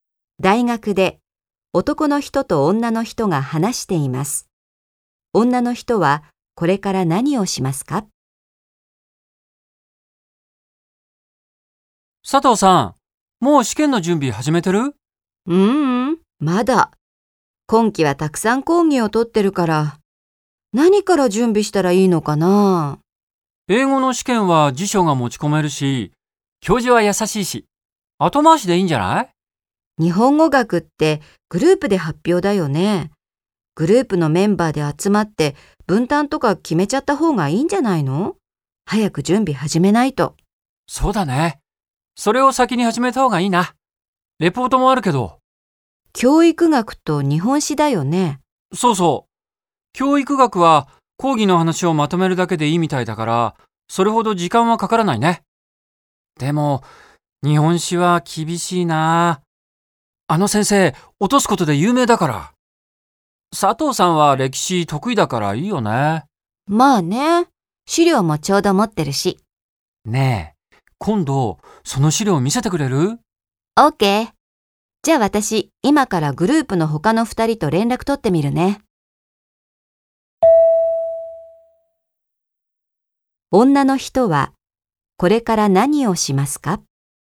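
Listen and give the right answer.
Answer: グループの他の2人と連絡を取る(日本語学の発表の準備)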